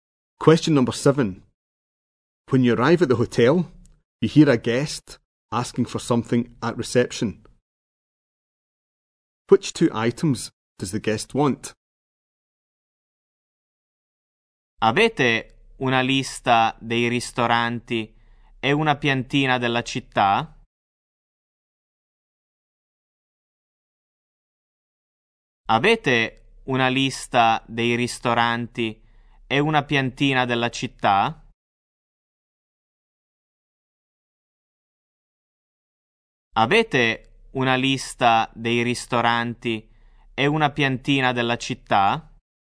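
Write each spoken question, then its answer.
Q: Which two items does the guest want?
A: A list of restaurants and a map of the town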